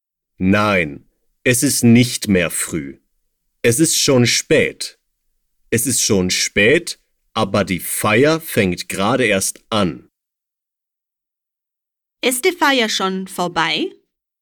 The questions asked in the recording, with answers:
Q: Ist die Feier schon vorbei?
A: Nein, die Feier ist noch nicht vorbei.